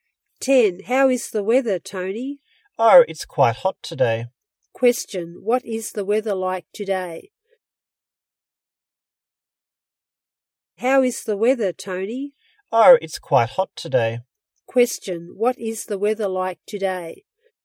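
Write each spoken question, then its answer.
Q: Question, what is the weather like today?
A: Quite hot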